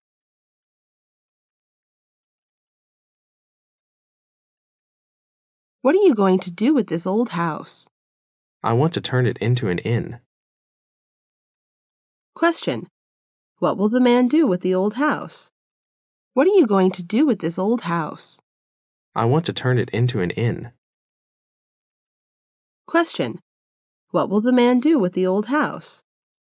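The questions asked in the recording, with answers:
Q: What will the man do with the old house?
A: Turn it into an inn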